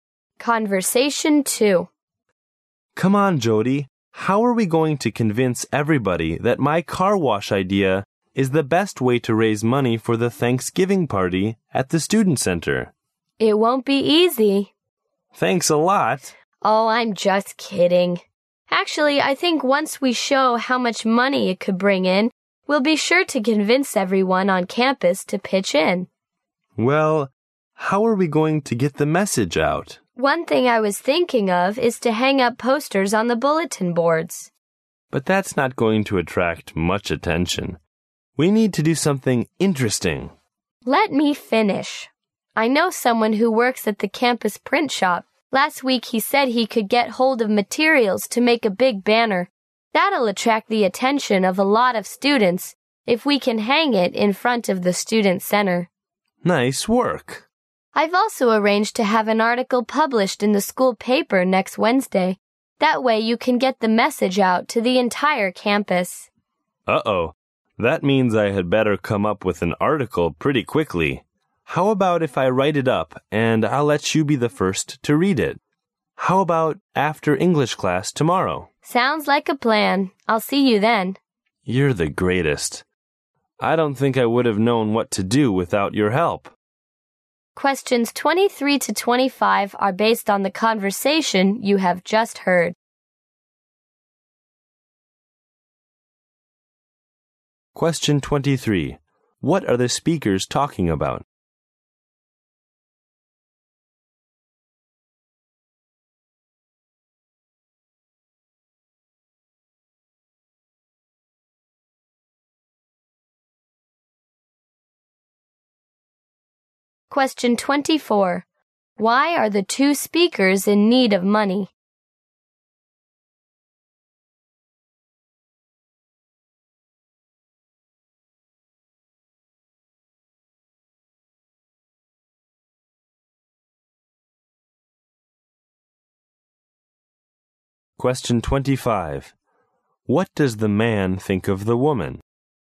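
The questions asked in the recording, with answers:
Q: What are the speakers talking about?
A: How to promote a car wash to raise money

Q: Why are the two speakers in need of money?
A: For the Thanksgiving party at the student center

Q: What does the man think of the woman?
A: She is very helpful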